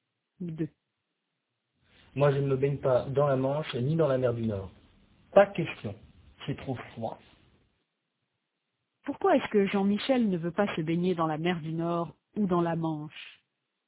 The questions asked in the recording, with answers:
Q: Pourquoi est-ce que Jean-Michel ne veut pas se baigner dans la mer du Nord ou dans la Manche?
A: Parce que c'est trop froid.